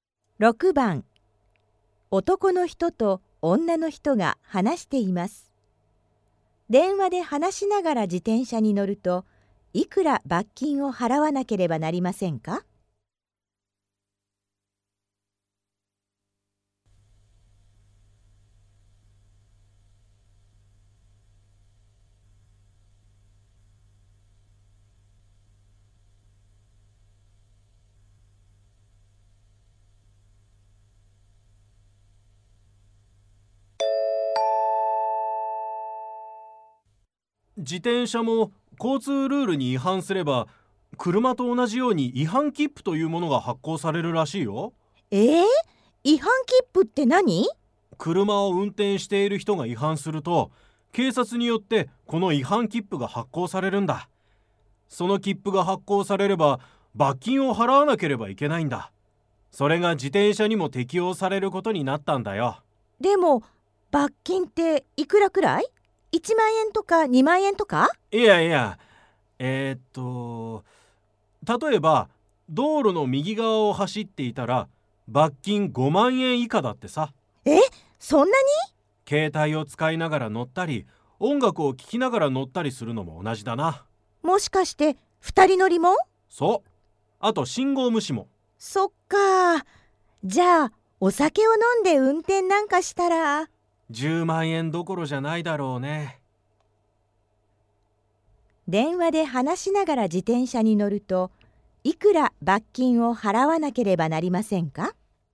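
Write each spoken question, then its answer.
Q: 電話で話しながら自転車に乗ると、いくら罰金を払わなければなりませんか?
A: 5万円以下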